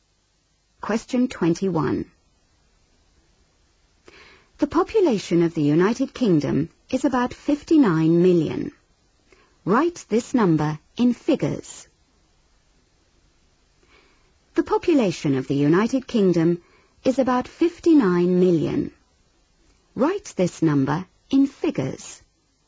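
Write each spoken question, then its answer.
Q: Write this number in figures.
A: 59000000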